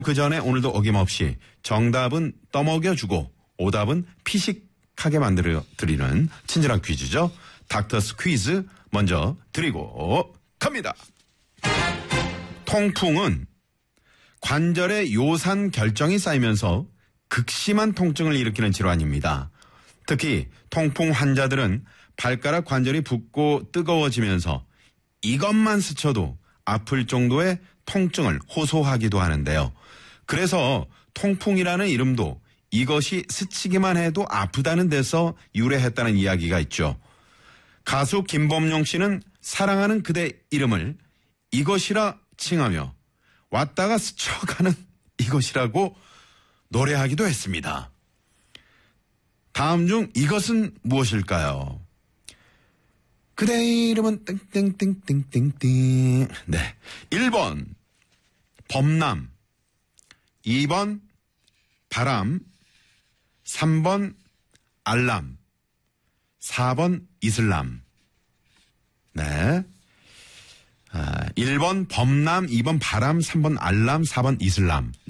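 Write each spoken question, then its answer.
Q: 다음 중 이것은 무엇일까요?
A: 2번: 바람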